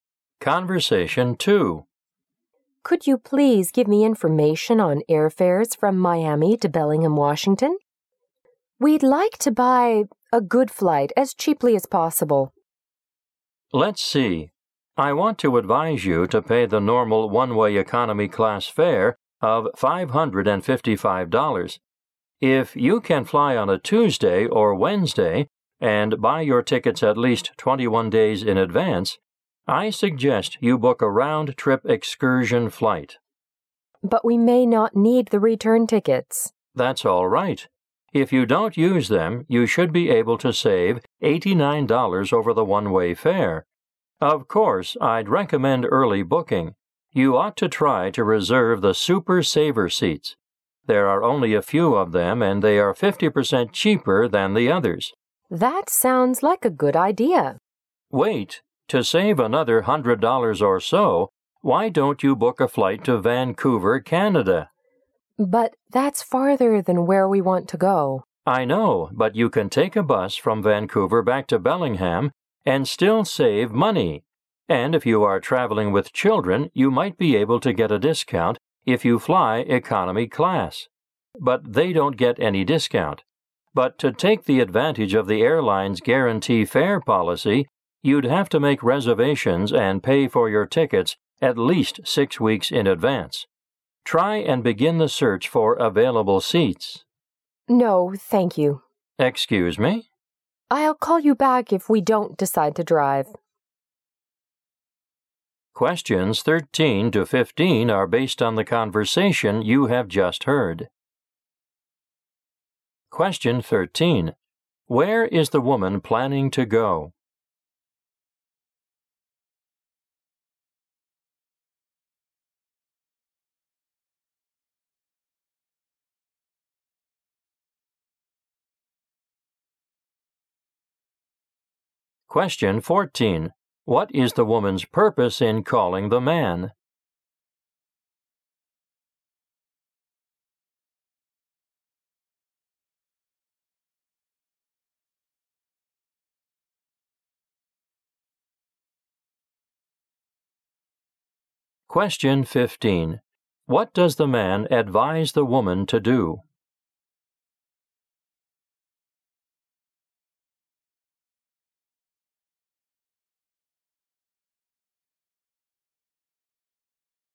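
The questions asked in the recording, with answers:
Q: Where is the woman planning to go?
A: Bellingham, Washington.

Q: What is the woman's purpose in calling the man?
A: To get information on airfares and find a cheap flight.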